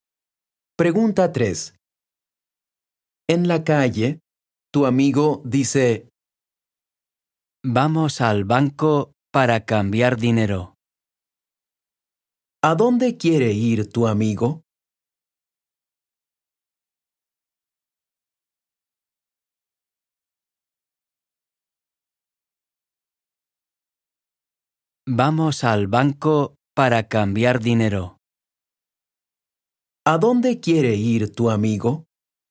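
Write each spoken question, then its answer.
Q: ¿A dónde quiere ir tu amigo?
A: Al banco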